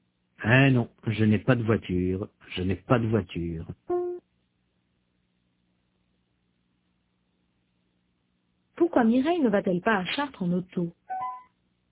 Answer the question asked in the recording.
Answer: Parce qu'elle n'a pas de voiture.